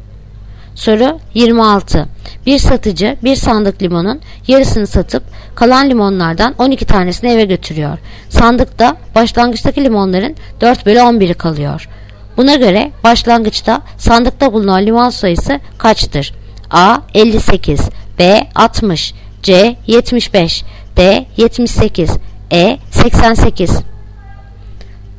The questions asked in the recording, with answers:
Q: Buna göre başlangıçta sandıkta bulunan limon sayısı kaçtır?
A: Cevap Edirne 88.